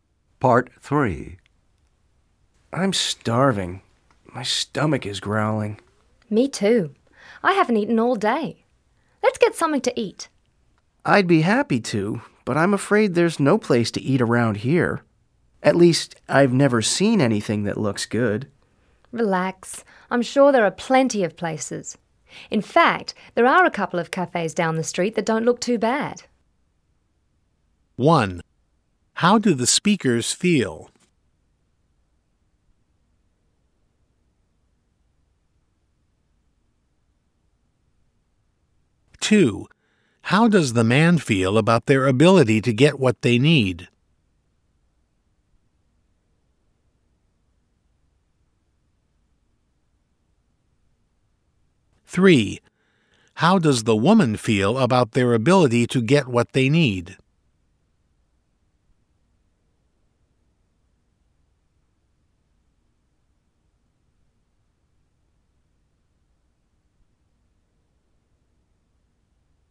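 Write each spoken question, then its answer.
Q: How do the speakers feel?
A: Hungry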